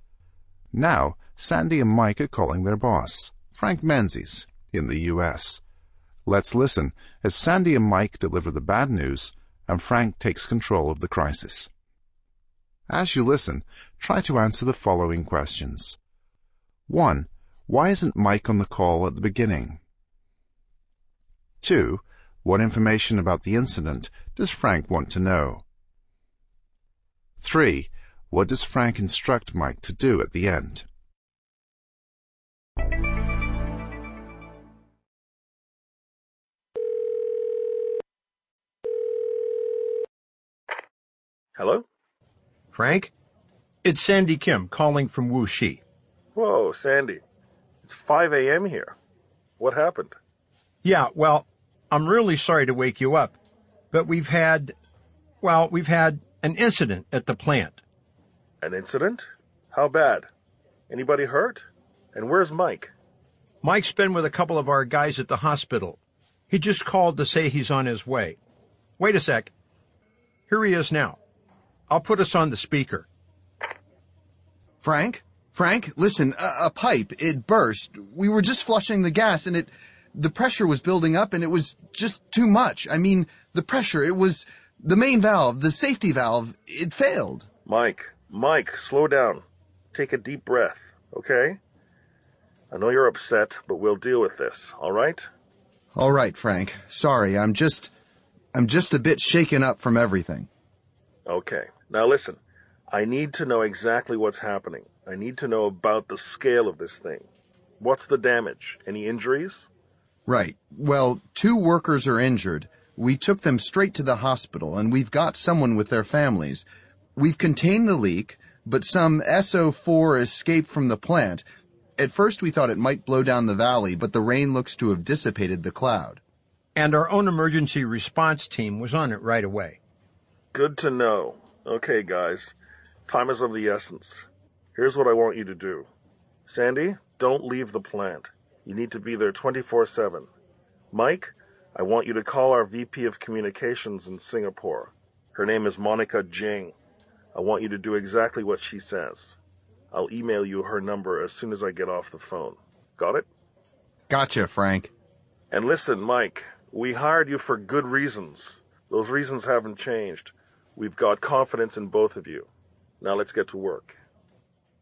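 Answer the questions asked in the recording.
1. He was at the hospital with the injured workers.
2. The scale of it: the damage and any injuries.
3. Call the VP of Communications in Singapore, Monica Jing, and do exactly what she says.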